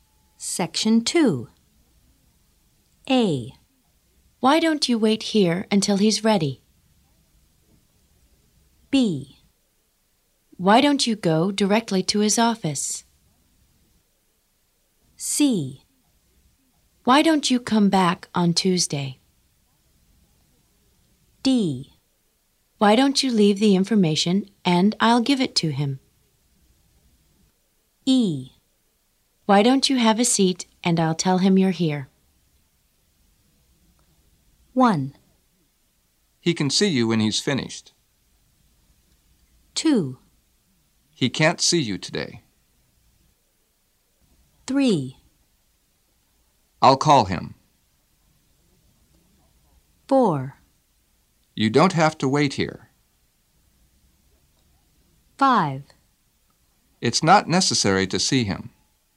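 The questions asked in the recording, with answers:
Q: He can see you when he's finished.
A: A: Why don't you wait here until he's ready?

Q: He can't see you today.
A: C: Why don't you come back on Tuesday?

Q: I'll call him.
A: E: Why don't you have a seat and I'll tell him you're here?

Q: You don't have to wait here.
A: B: Why don't you go directly to his office?

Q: It's not necessary to see him.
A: D: Why don't you leave the information and I'll give it to him?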